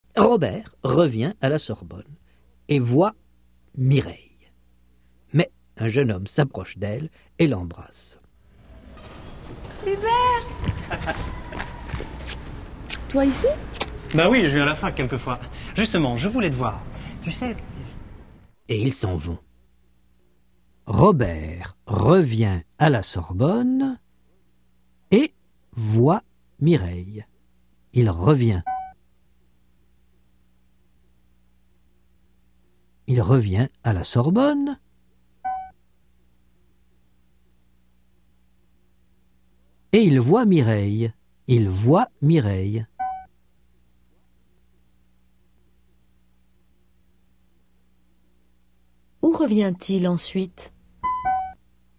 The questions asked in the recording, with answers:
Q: Où revient-il ensuite ?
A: À la Sorbonne.